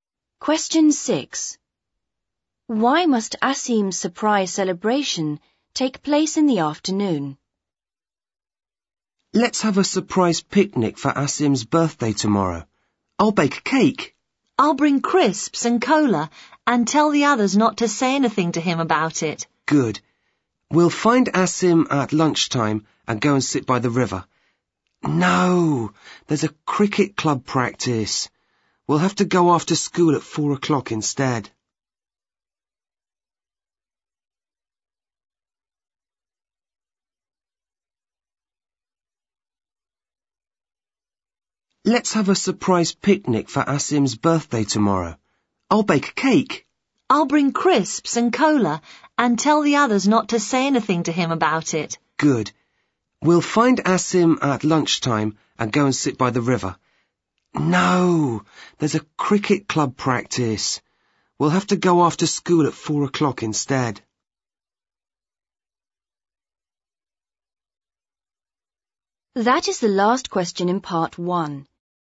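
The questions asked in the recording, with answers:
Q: Why must Asim's surprise celebration take place in the afternoon?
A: There is a cricket club practice at lunchtime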